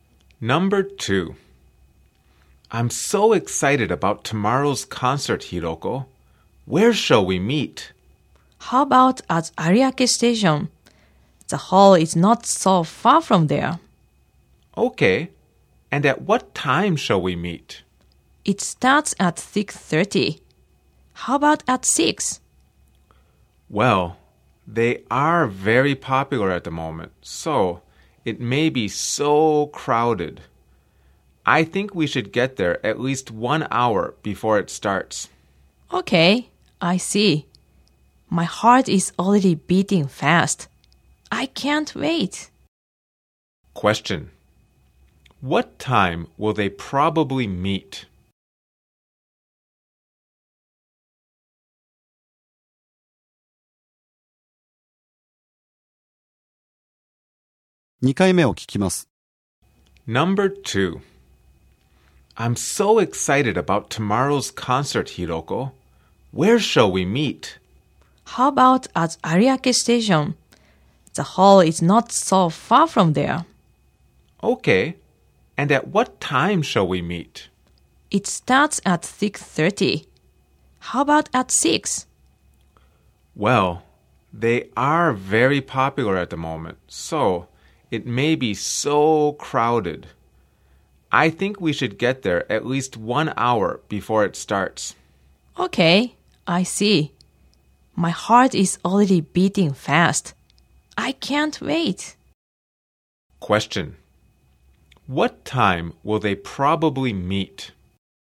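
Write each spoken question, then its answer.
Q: What time will they probably meet?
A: At 5:30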